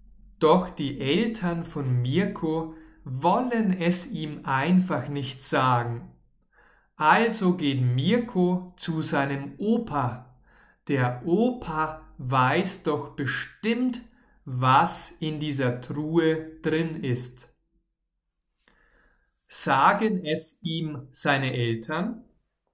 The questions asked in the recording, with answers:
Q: Sagen es ihm seine Eltern?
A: Nein, leider nicht seine Eltern sagen es ihm nicht.